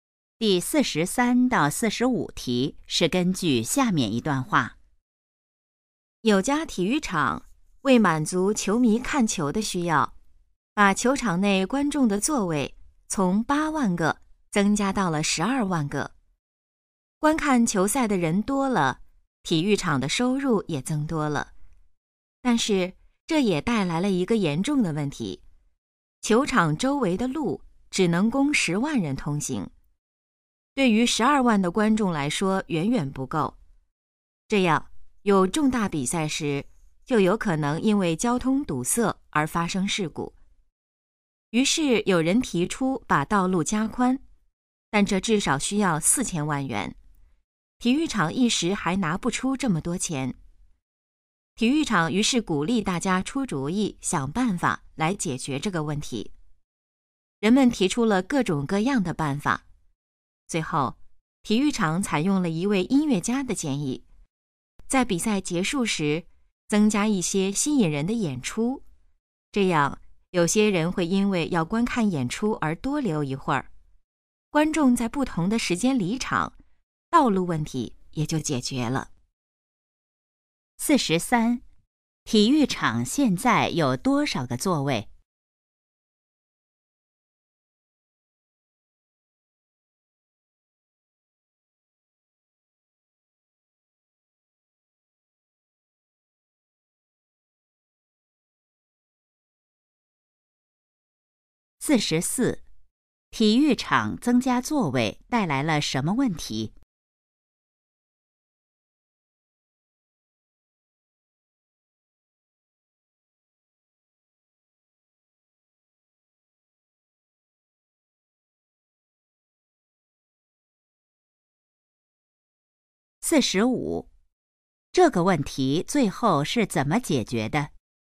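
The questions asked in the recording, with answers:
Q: 体育场现在有多少个座位?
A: 12万个

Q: 体育场增加座位带来了什么问题?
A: 交通问题,周围的路不够通行

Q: 这个问题最后是怎么解决的?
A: 比赛结束时增加演出,让观众在不同时间离场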